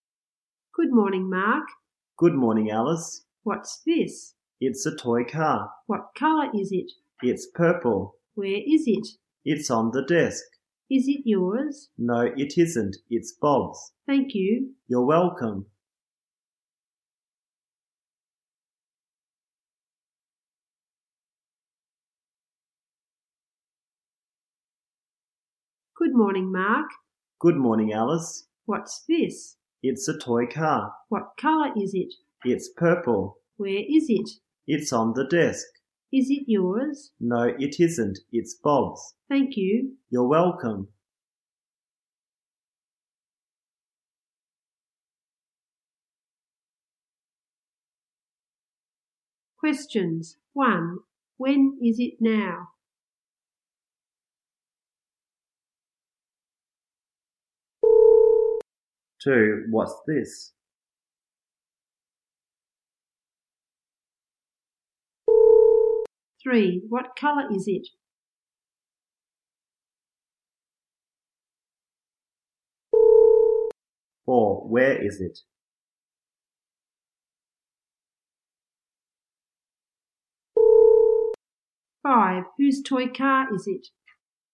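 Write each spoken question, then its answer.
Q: When is it now?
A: In the morning.

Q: What's this?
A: A toy car.

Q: What colour is it?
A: Purple.

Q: Where is it?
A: On the desk.

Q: Whose toy car is it?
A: Bob's.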